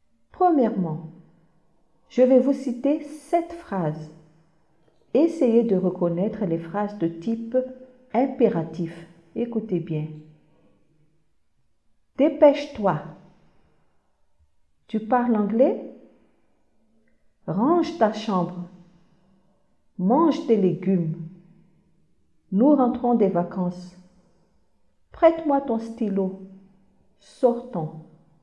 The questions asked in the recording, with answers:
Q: Dépêche-toi.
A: Dépêche-toi est une phrase impérative.

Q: Tu parles anglais?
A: Ce n'est pas une phrase impérative, c'est une phrase interrogative.

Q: Range ta chambre.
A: C'est une phrase impérative.

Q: Mange des légumes.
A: C'est encore une phrase impérative.

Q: Nous rentrons des vacances.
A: Ce n'est pas une phrase impérative.

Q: Prête-moi ton stylo.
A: Prête-moi ton stylo est une phrase impérative.

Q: Sortons.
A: sortons, c'est une phrase impérative.